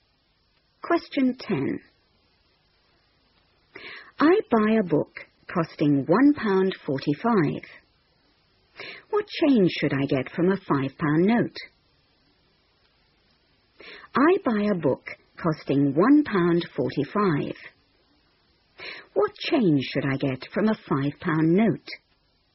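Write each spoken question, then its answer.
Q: What change should I get from a £5 note?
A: £3.55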